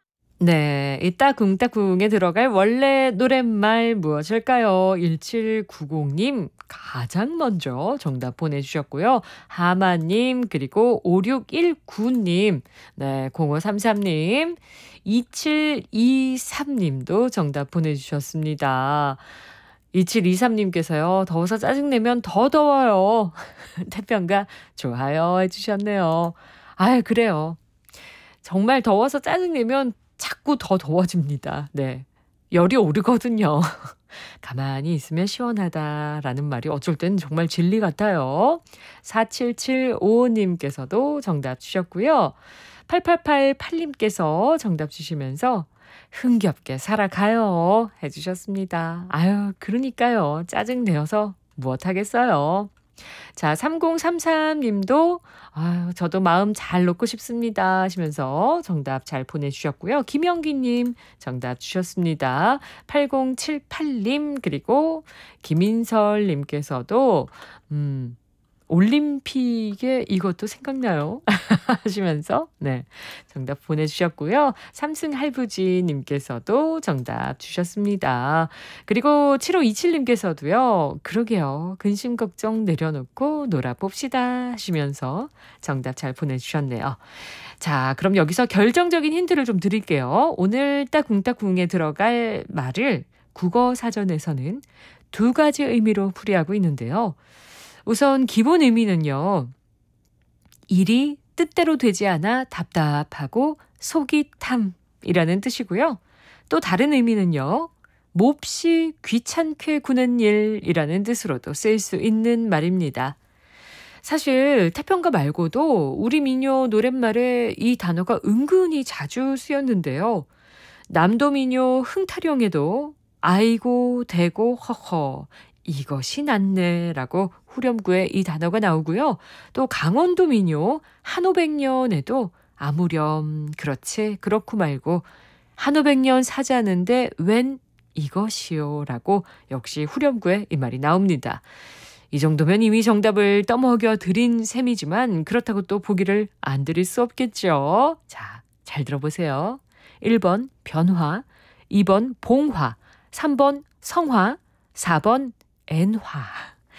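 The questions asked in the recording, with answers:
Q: 네, 이 따궁따궁에 들어갈 원래 노랫말 무엇일까요?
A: 3: 성화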